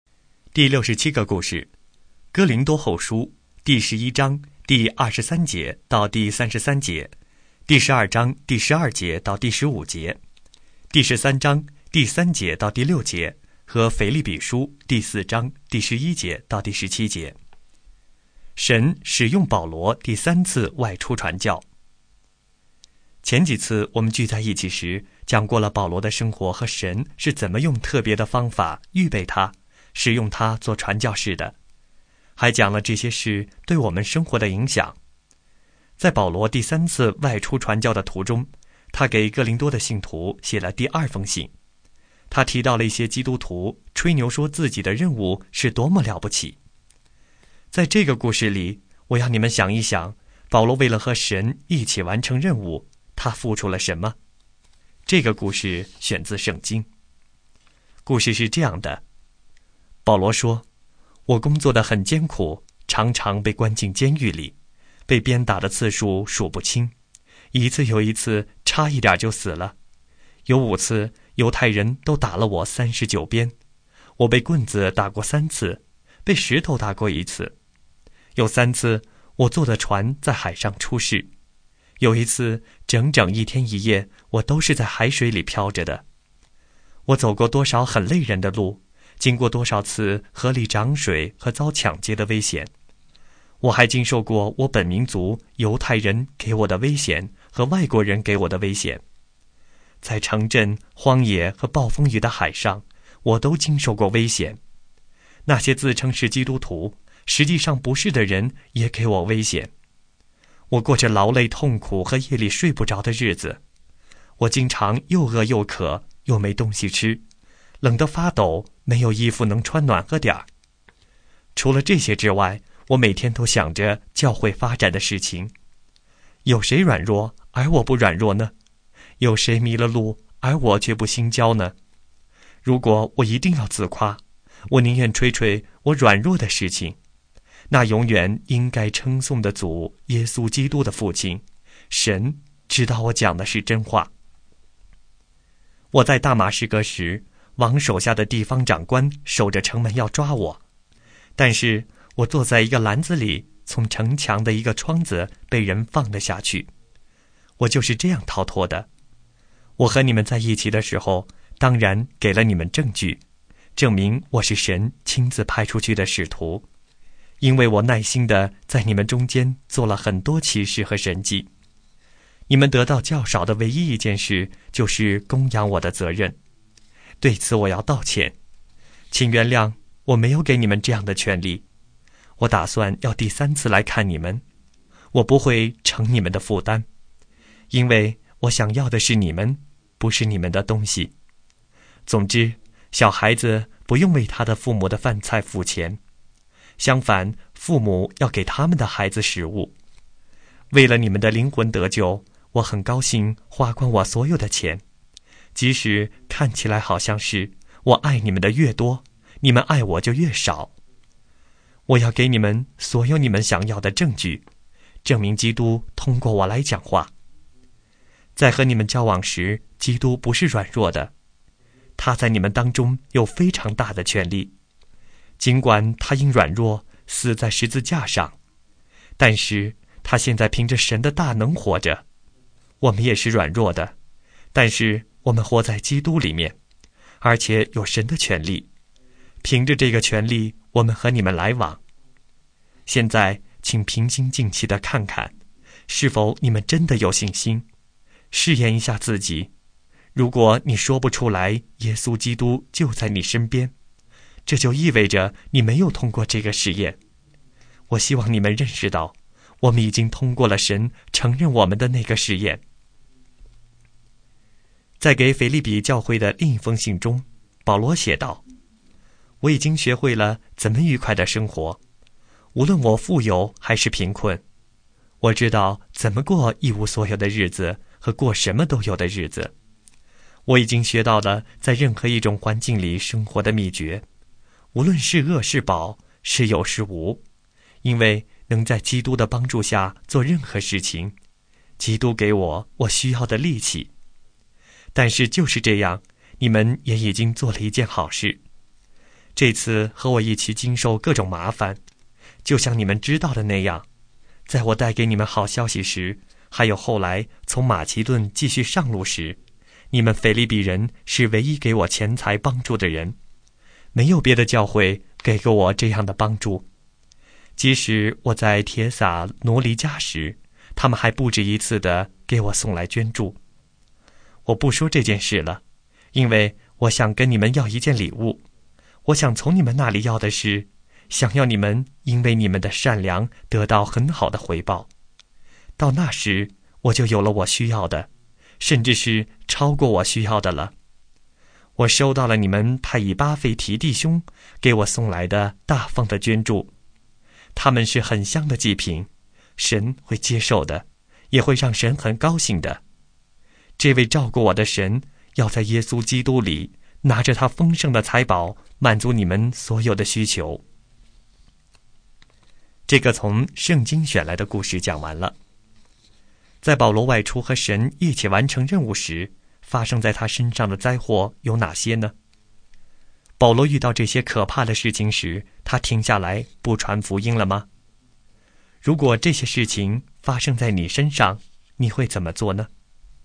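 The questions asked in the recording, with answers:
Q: 在保罗外出和神一起完成任务时,发生在他身上的灾祸有哪些呢?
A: 被关进监狱、被鞭打、被棍子和石头打、船在海上出事、遭抢劫和各种危险、又饿又渴又冷

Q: 保罗遇到这些可怕的事情时,他停下来不传福音了吗?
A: 没有,他继续传福音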